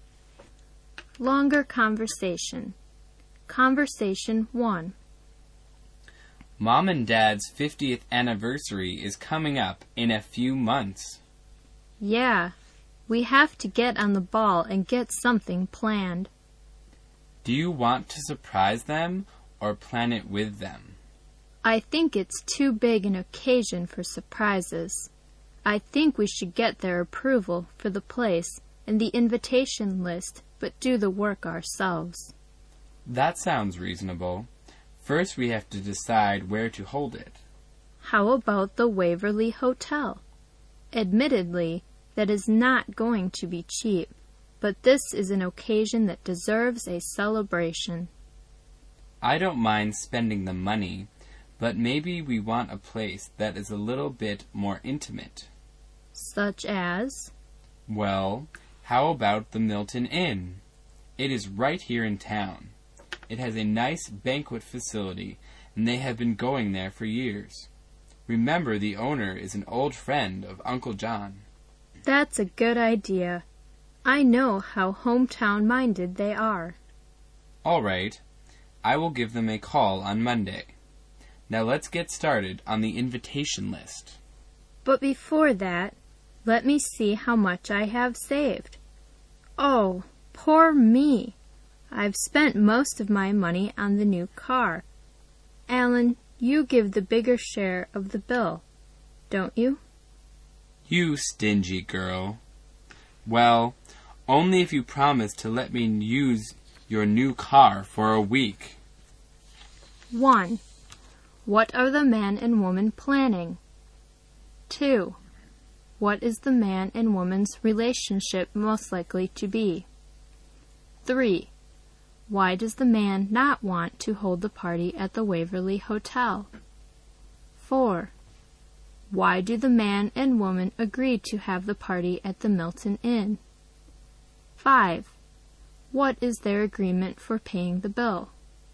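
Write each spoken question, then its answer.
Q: What are the man and woman planning?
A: A party for their parents' 50th wedding anniversary

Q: What is the man and woman's relationship most likely to be?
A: Brother and sister

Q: Why do the man and woman agree to have the party at the Milton Inn?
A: It is in town, and their hometown-minded parents have gone there for years

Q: What is their agreement for paying the bill?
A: Alan pays the bigger share if she lets him use her new car for a week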